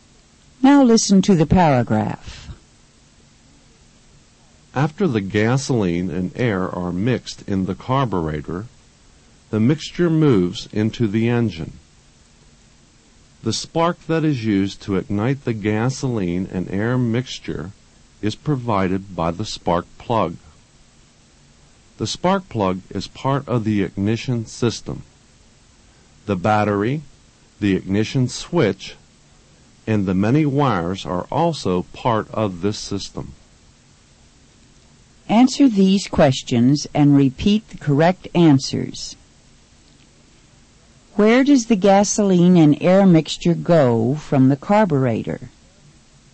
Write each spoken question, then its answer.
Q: Where does the gasoline and air mixture go from the carburetor?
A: It goes to the engine.